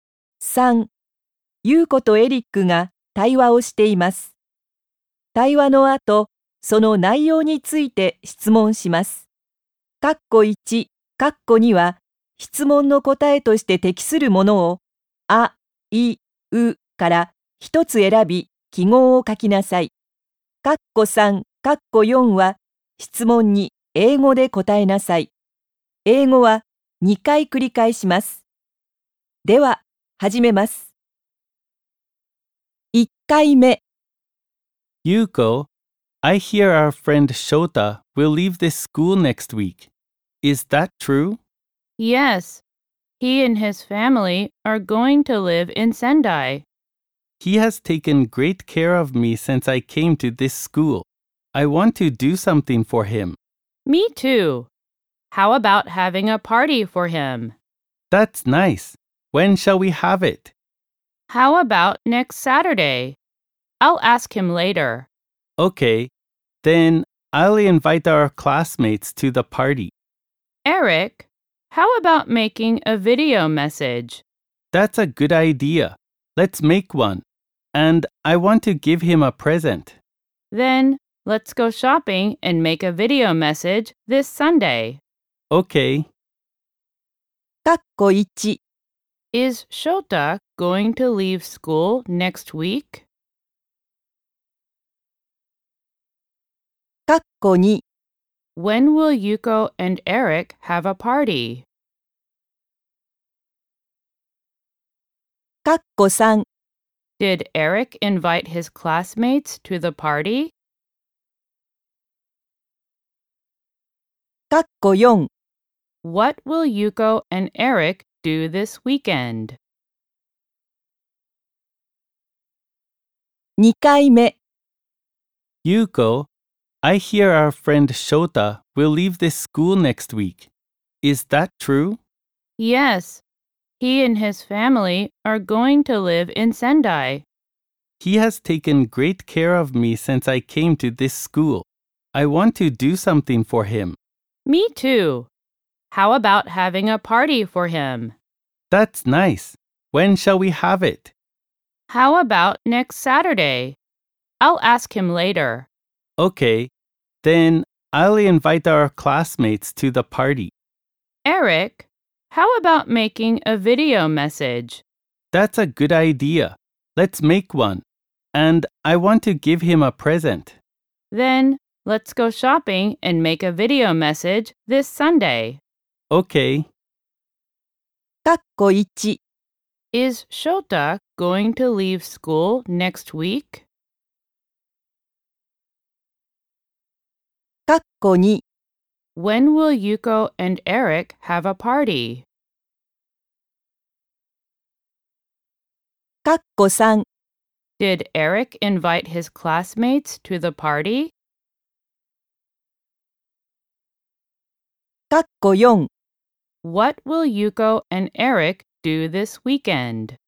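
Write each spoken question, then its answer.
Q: Is Shota going to leave school next week?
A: Yes

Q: When will Yuko and Eric have a party?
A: Next Saturday

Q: What will Yuko and Eric do this weekend?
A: They will go shopping and make a video message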